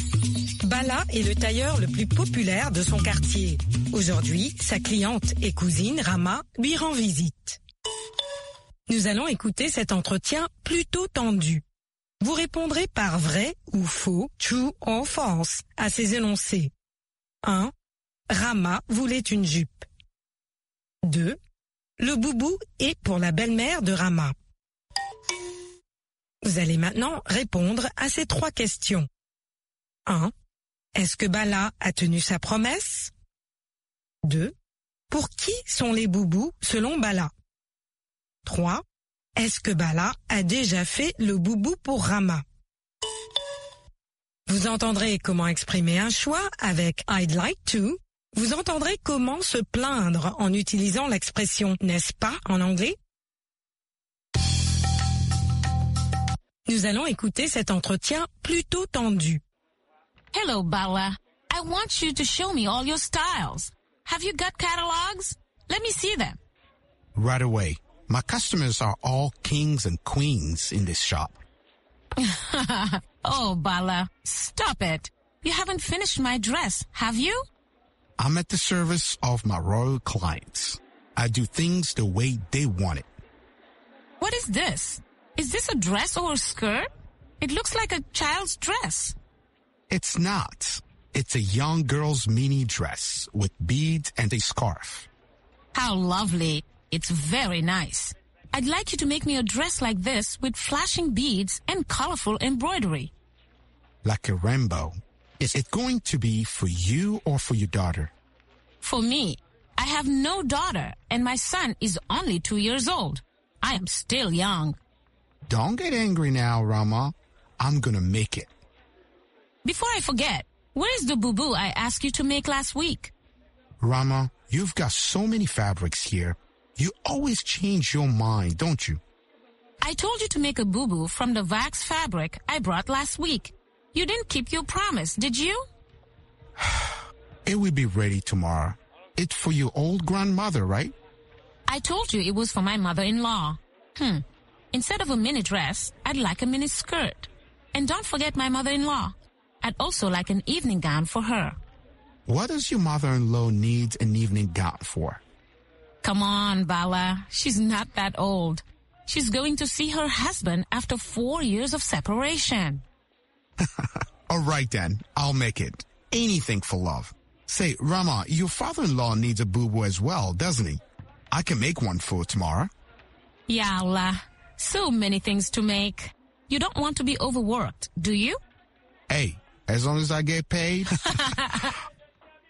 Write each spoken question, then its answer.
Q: Le boubou est pour la belle-mère de Rama.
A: L'énoncé 2 est vrai. Le boubou est pour la belle-mère de Rama.

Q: Est-ce que Bala a tenu sa promesse?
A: Non.

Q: Pour qui sont les boubous selon Bala?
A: Pour les personnes âgées.

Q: Est-ce que Bala a déjà fait le boubou pour Rama?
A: Pas encore.